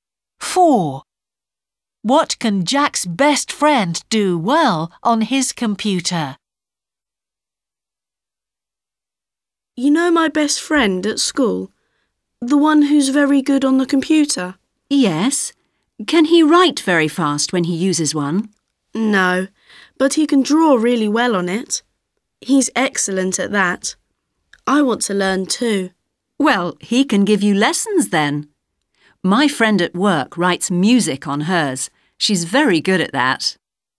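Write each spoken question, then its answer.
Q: What can Jack's best friend do well on his computer?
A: draw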